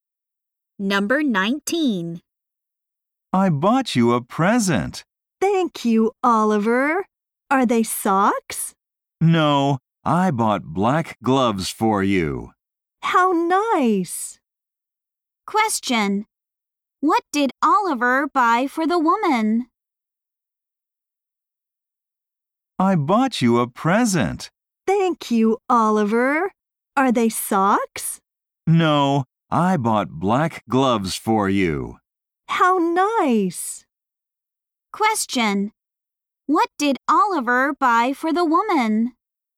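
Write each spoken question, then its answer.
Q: What did Oliver buy for the woman?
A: Black gloves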